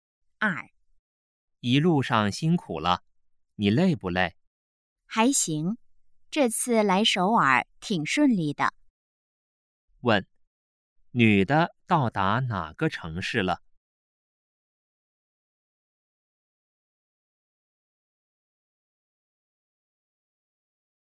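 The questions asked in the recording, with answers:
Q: 问,女的到达哪个城市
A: 首尔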